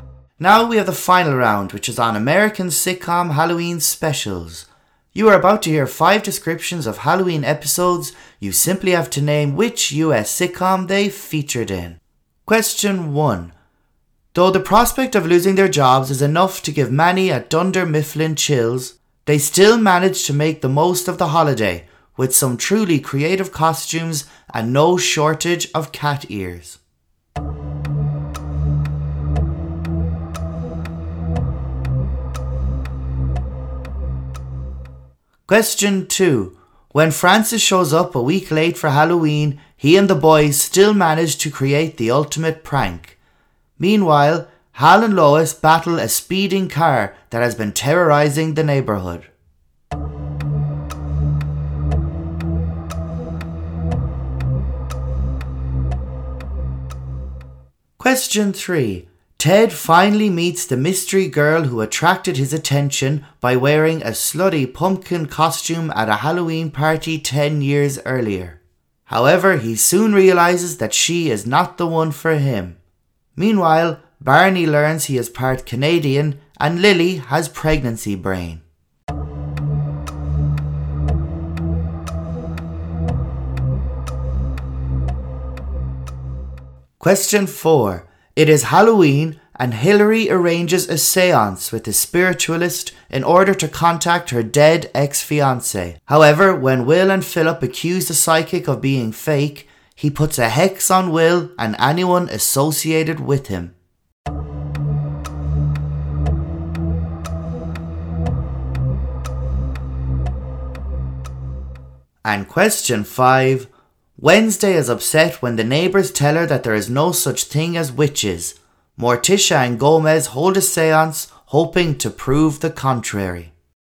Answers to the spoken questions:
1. it was the US office.
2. It was the Halloween special from Malcolm in the Middle.
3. which was the main theme in the entire series of How I Met Your Mother.
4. It was the Halloween special of The Fresh Prince of Bel Air.
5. Wednesday, Morticia and Gomez, of course, the Addams family.